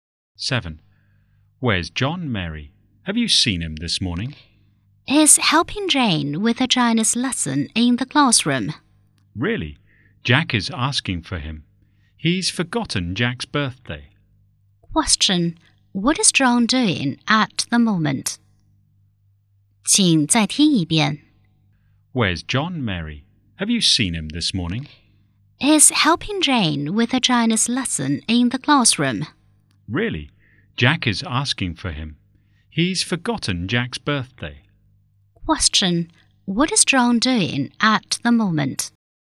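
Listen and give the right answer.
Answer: Helping Jane with a Chinese lesson in the classroom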